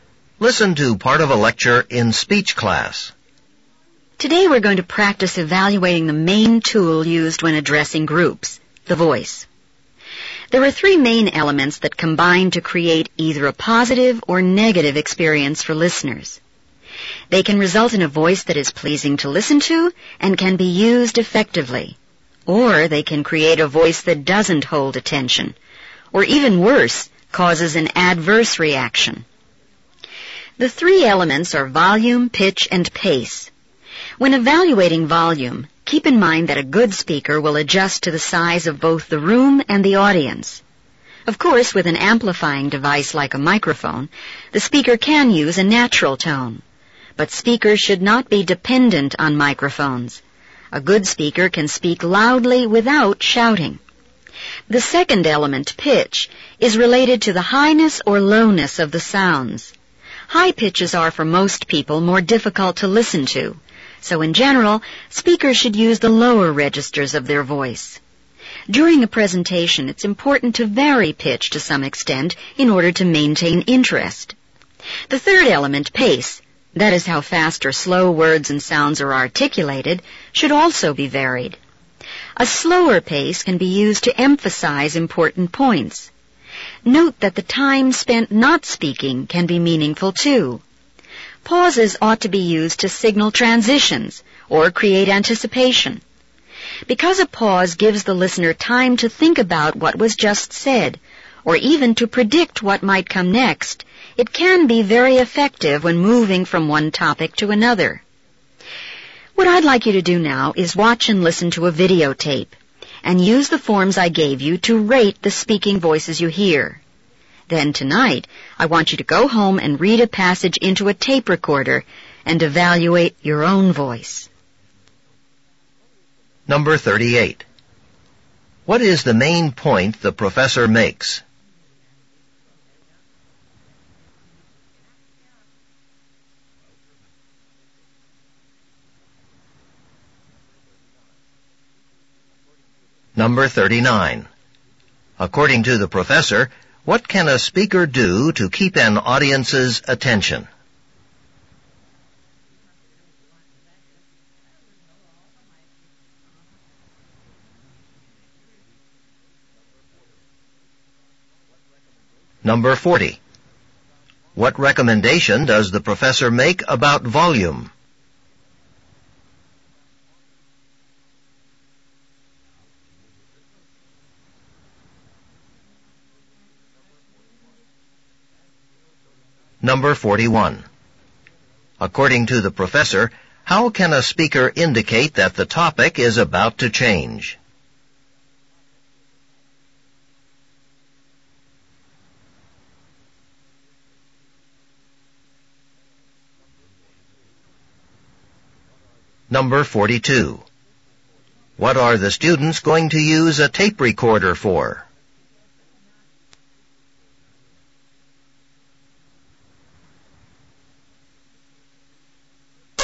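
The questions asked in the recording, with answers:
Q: What is the main point the professor makes?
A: Volume, pitch and pace combine to make a voice pleasing or not for listeners

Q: According to the professor, what can a speaker do to keep an audience's attention?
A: Vary the pitch of the voice

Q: What recommendation does the professor make about volume?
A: Adjust it to the size of the room and the audience, speaking loudly without shouting

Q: According to the professor, how can a speaker indicate that the topic is about to change?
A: By pausing

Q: What are the students going to use a tape recorder for?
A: To record themselves reading a passage and rate their own voice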